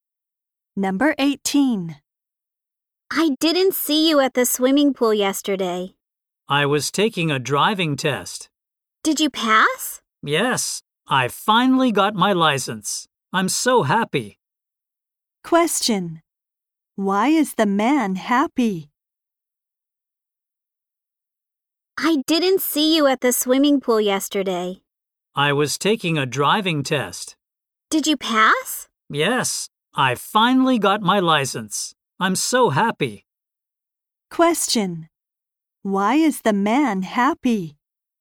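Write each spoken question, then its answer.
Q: Why is the man happy?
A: He passed his driving test and got his license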